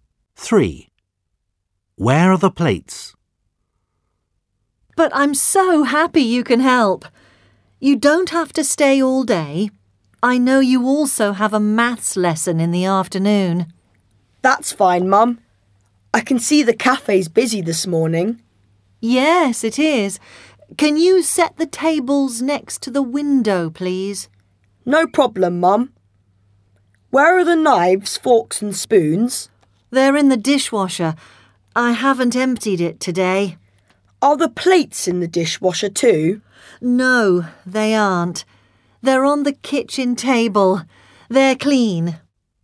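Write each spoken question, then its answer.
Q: Where are the plates?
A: On the kitchen table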